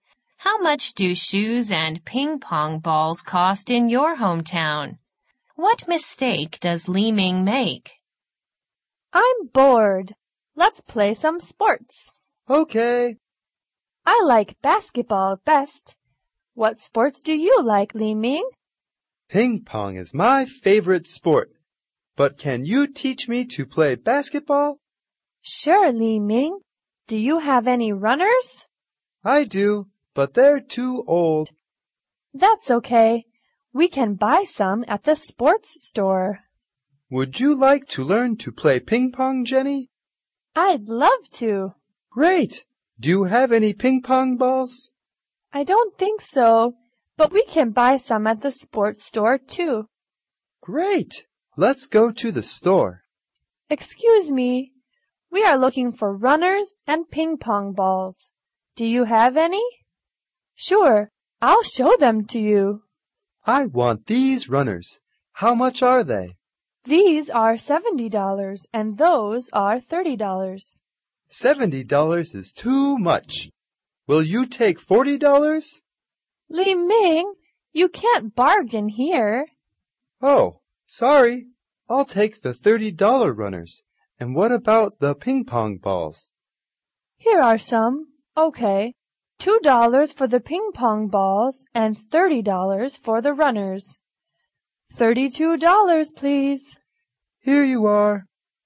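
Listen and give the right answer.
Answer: He tries to bargain over the price of the runners in the store, where you can't bargain.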